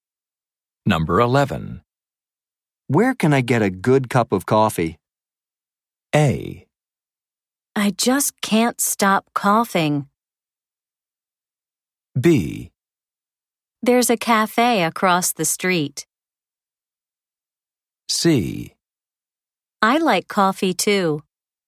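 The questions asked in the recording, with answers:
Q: Where can I get a good cup of coffee?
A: B: There's a cafe across the street.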